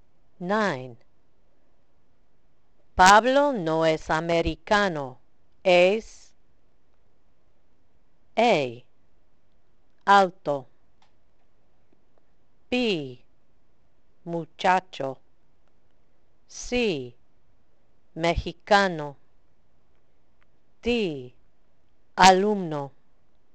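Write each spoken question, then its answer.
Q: Pablo no es americano, es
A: C: Mexicano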